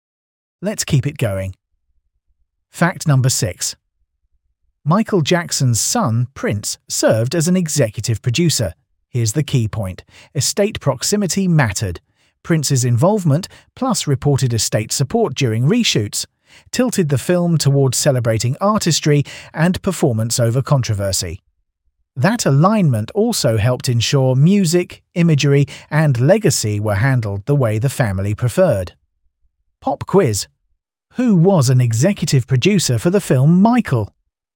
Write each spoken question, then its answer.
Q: Who was an executive producer for the film Michael?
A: Correct answer. Prince Jackson.